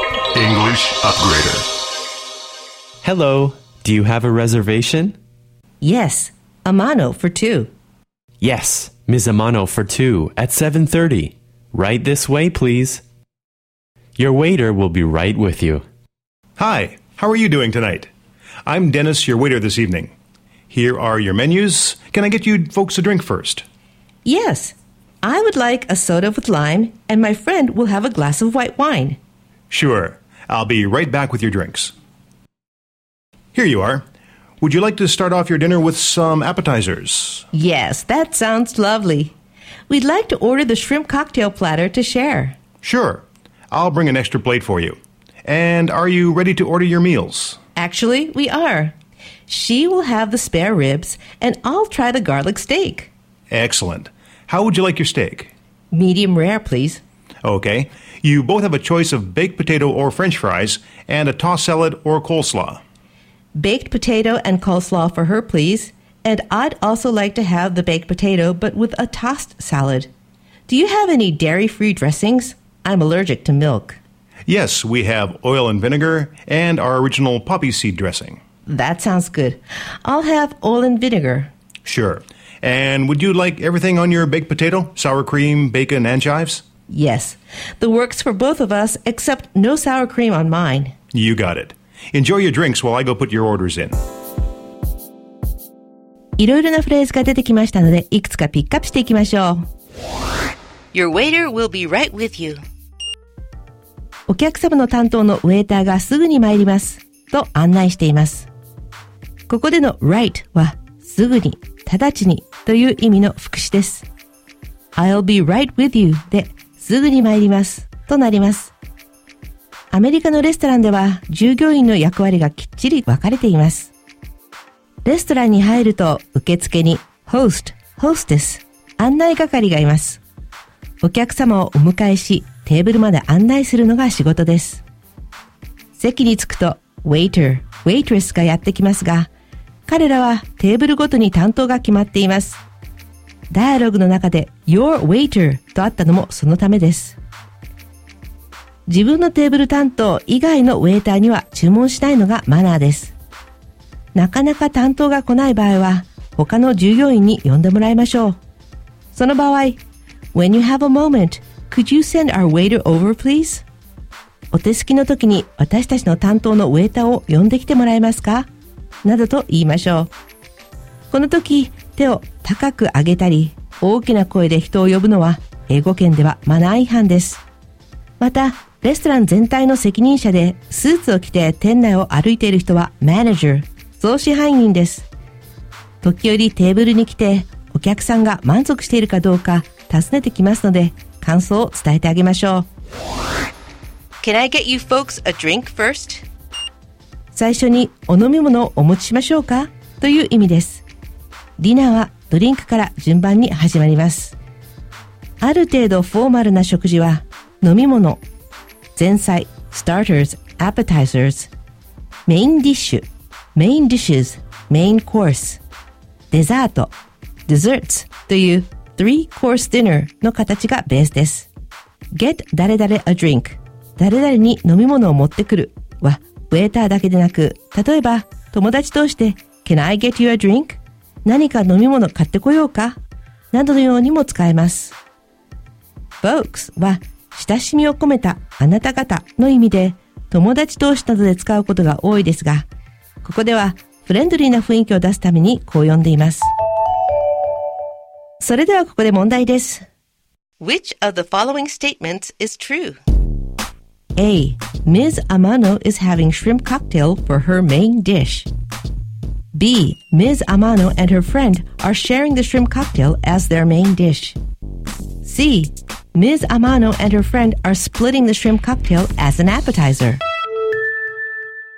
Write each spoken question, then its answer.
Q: Which of the following statements is true? A. Ms. Amano is having shrimp cocktail for her main dish. B. Ms. Amano and her friend are sharing the shrimp cocktail as their main dish. C. Ms. Amano and her friend are splitting the shrimp cocktail as an appetizer.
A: なので正解は C。